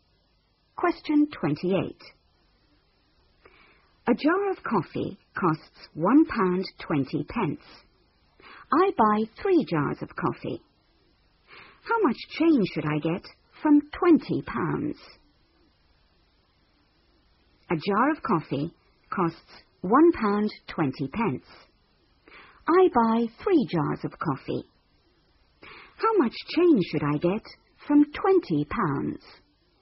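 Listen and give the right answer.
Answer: £16.40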